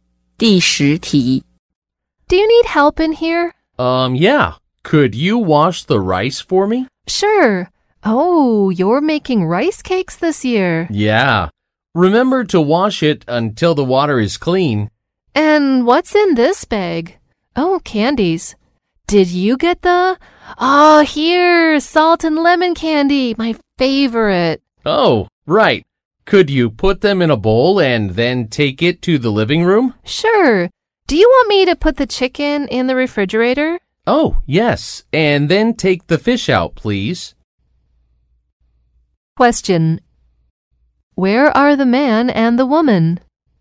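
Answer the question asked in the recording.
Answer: In the kitchen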